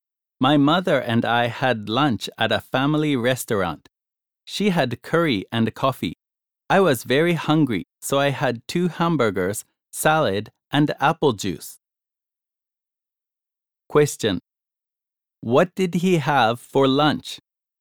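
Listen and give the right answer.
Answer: Two hamburgers, salad, and apple juice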